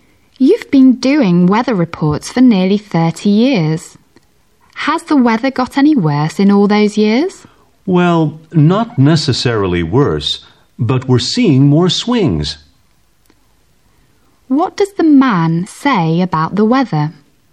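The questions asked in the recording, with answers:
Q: What does the man say about the weather?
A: It isn't necessarily worse, but it swings more.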